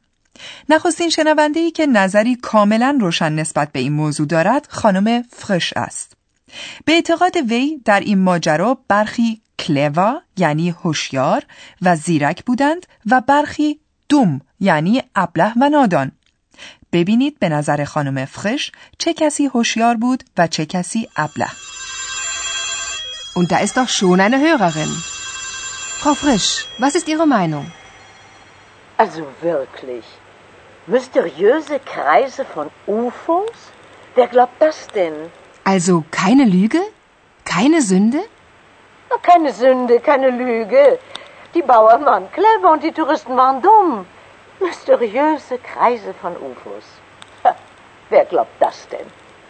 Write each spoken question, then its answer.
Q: ببینید به نظر خانم فرش چه کسی هوشیار بود و چه کسی ابله.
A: به نظر خانم فرش دهقانان یعنی باوان زیرک بودند و گردشگران ابله.